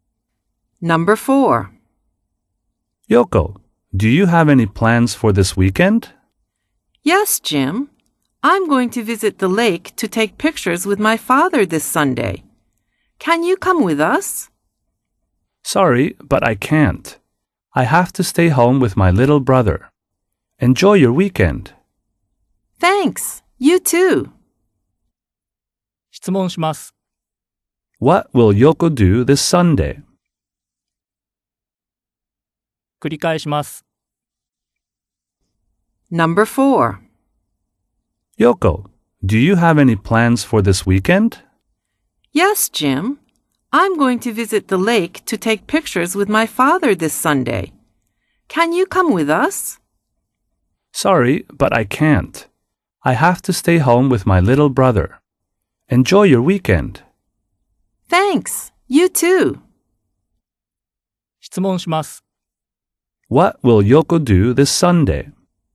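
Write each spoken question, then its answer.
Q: What will Yoko do this Sunday?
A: She will visit the lake to take pictures with her father.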